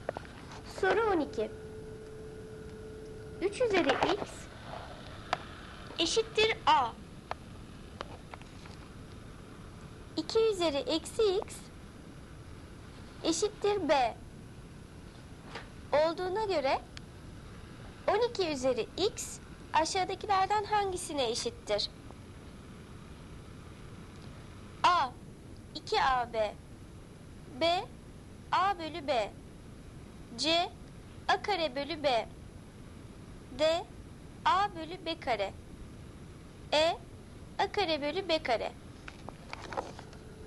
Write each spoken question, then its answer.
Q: 2 üzeri eksi x eşittir B olduğuna göre 12 üzeri x aşağıdakilerden hangisine eşittir?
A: Doğru cevap D A bölü B kare.